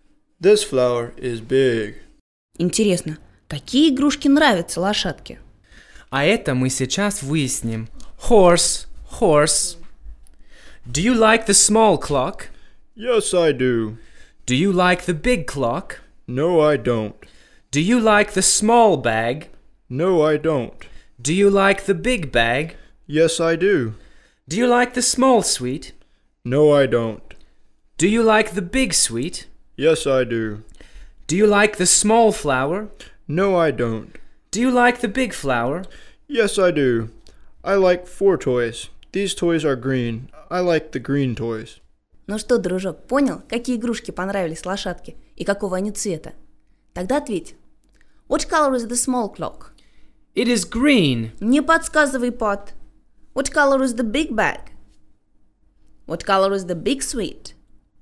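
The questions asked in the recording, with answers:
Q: What color is the big bag?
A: green

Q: What color is the big sweet?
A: green

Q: What color is the big flower?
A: green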